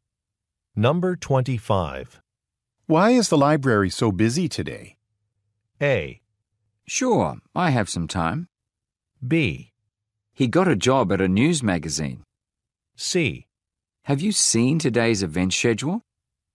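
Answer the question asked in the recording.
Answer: C: Have you seen today's event schedule?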